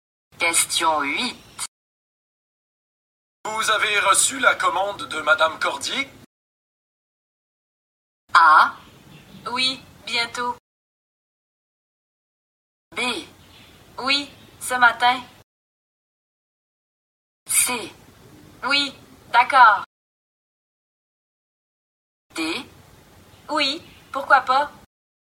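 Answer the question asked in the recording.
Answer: B: Oui, ce matin.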